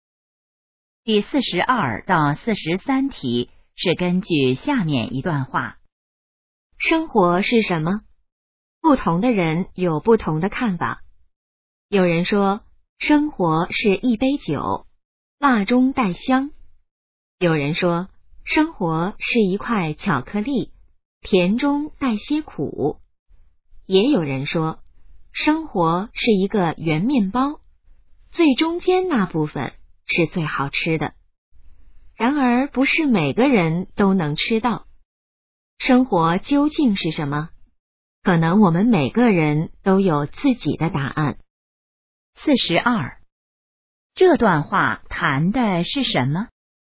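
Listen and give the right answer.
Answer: 生活是什么(对生活的不同看法)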